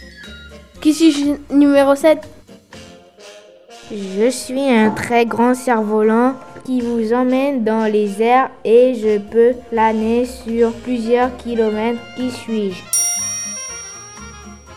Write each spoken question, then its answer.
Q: Qui suis-je?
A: Un deltaplane.